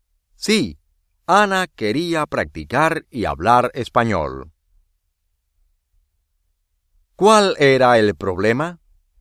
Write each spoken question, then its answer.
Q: ¿Cuál era el problema?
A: Ana no quería ir a la escuela.